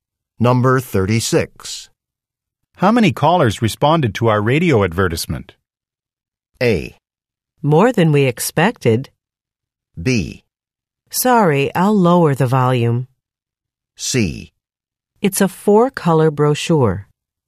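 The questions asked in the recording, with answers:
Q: How many callers responded to our radio advertisement?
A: A: More than we expected.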